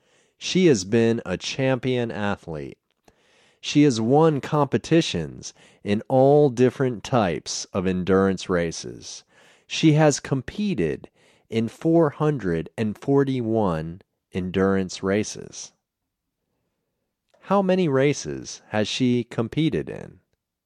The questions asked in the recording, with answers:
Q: How many races has she competed in?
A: She has competed in 441 races.